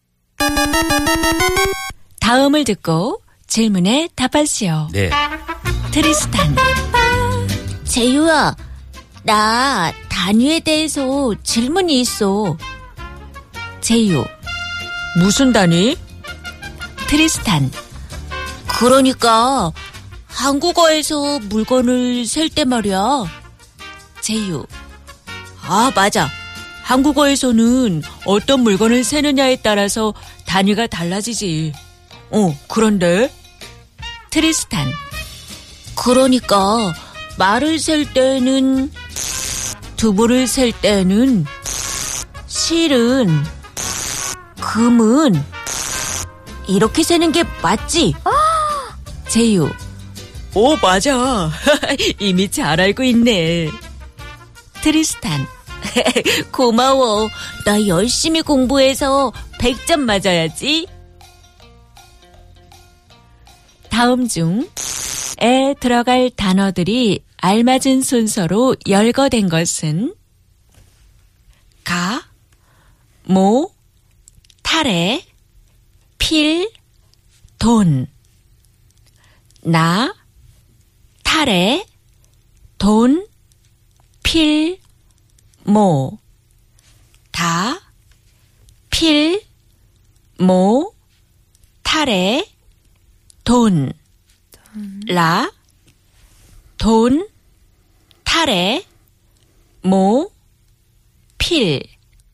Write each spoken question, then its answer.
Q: 다음 중에 들어갈 단어들이 알맞은 순서로 열거된 것은?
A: Da, pil, mo, tare, don.